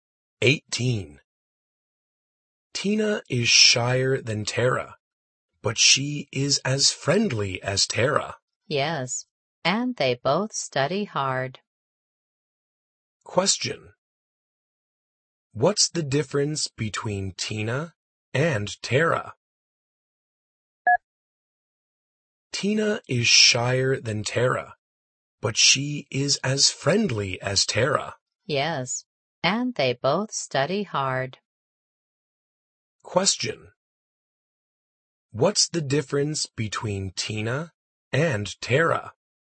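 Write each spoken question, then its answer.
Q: What's the difference between Tina and Tara?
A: Tina is shyer than Tara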